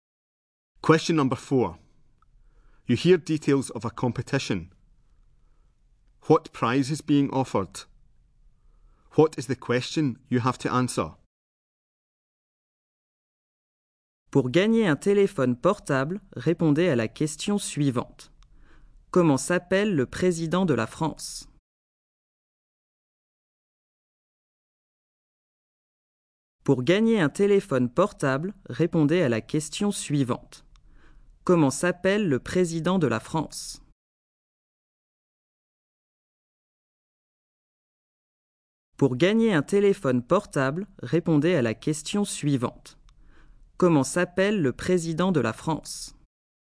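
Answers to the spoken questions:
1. A mobile phone
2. What is the name of the French president?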